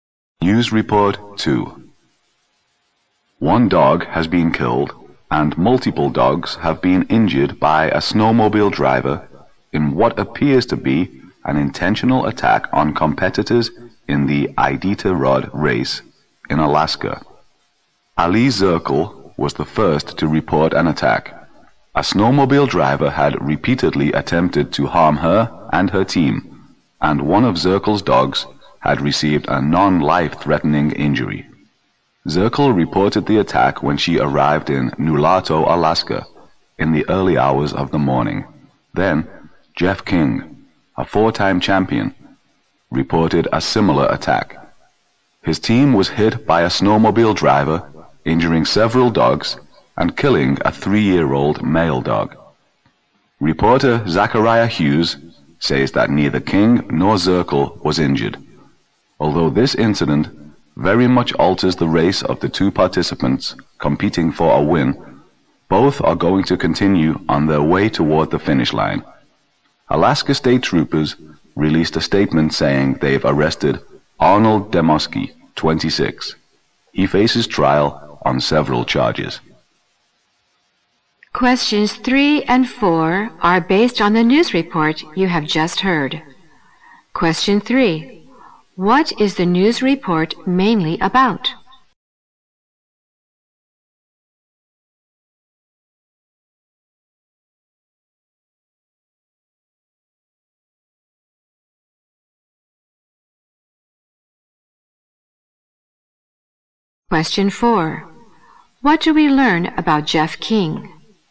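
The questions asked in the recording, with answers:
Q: What is the news report mainly about?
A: A snowmobile driver's attack on dog teams in the Iditarod race

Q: What do we learn about Jeff King?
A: He is a four-time champion whose team was hit, with one dog killed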